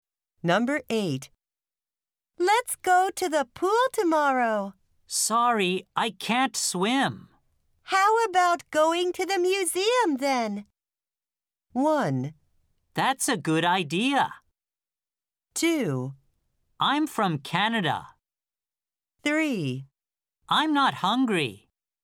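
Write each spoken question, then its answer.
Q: How about going to the museum then?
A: 1: That's a good idea.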